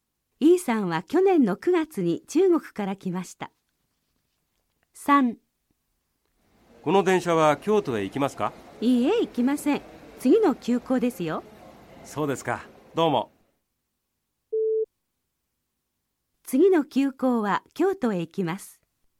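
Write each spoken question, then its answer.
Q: 次の急行は京都へ行きます。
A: ○(正しい)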